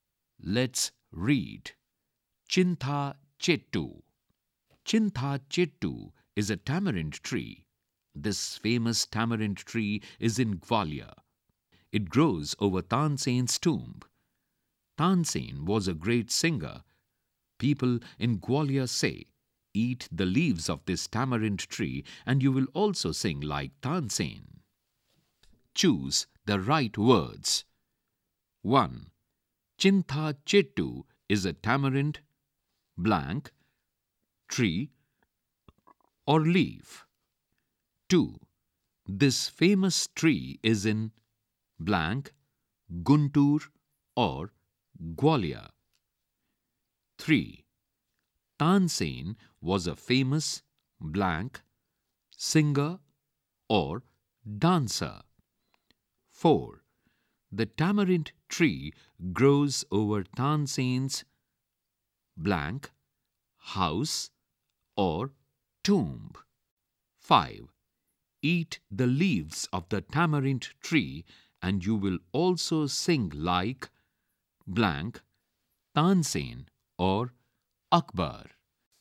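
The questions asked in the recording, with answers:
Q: Chintha Chettu is a tamarind, blank, tree or leaf.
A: tree

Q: This famous tree is in, blank, Guntur or Gwalior.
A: Gwalior

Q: Tansen was a famous, blank, singer or dancer.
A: singer

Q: The tamarind tree grows over Tansen's blank house or tomb.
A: tomb

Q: Eat the leaves of the tamarind tree and you will also sing like blank Tansen or Akbar.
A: Tansen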